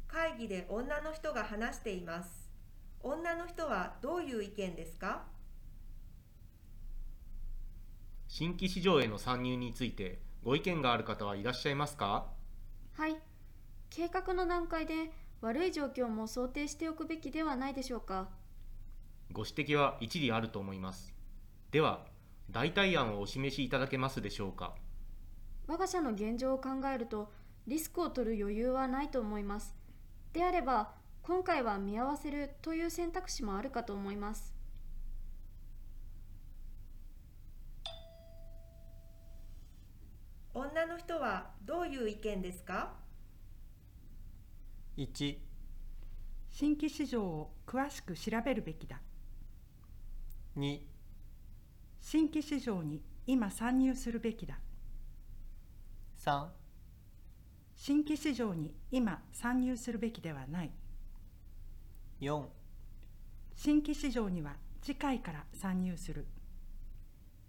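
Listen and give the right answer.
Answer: 3: 新規市場に今参入するべきではない。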